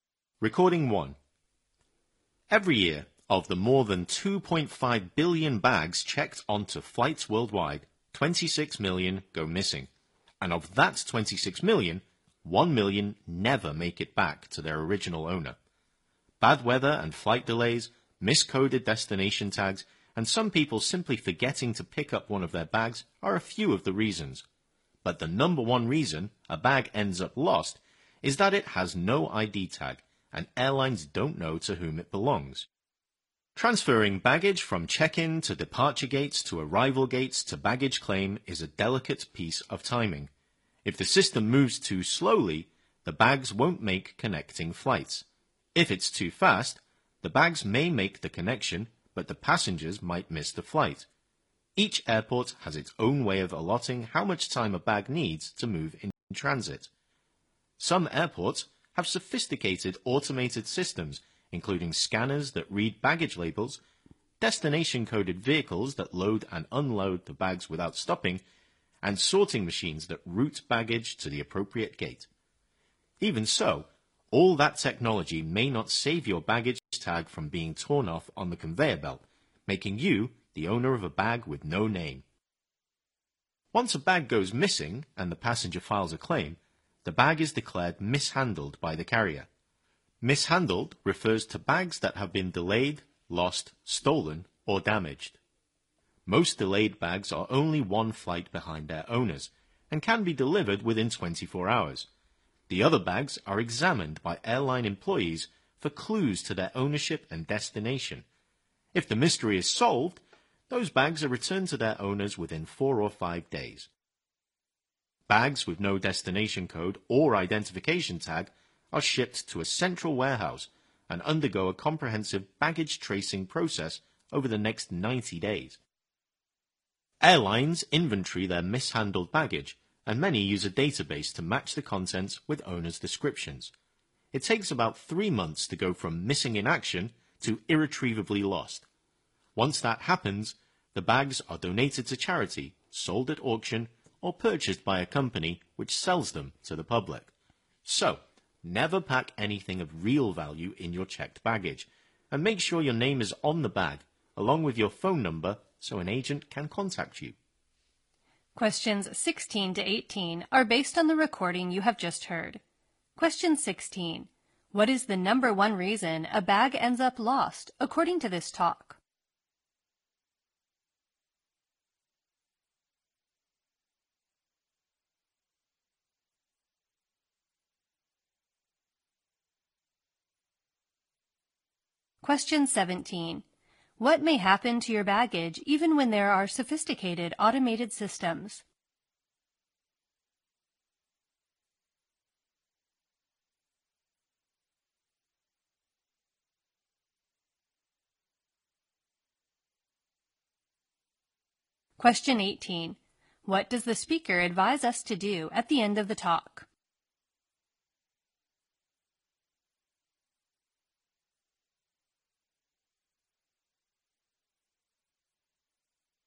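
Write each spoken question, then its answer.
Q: What is the number one reason a bag ends up lost, according to this talk?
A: It has no ID tag

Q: What may happen to your baggage even when there are sophisticated automated systems?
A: Its tag may be torn off on the conveyor belt

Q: What does the speaker advise us to do at the end of the talk?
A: Never pack anything valuable in checked baggage and put your name and phone number on the bag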